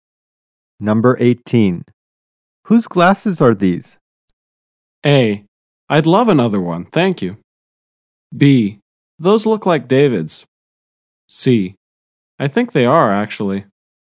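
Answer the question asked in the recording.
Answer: B: Those look like David's.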